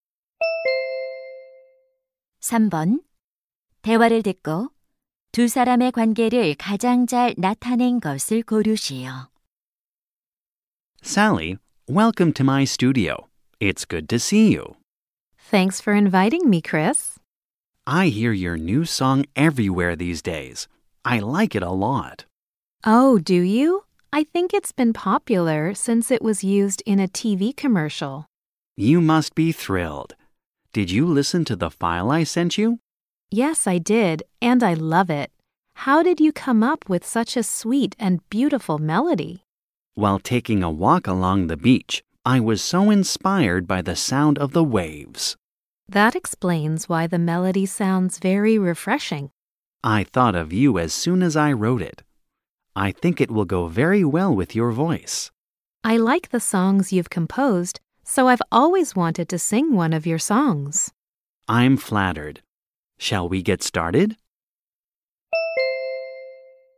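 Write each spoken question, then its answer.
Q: 대화를 듣고 두 사람의 관계를 가장 잘 나타낸 것을 고르시오.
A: 작곡가 - 가수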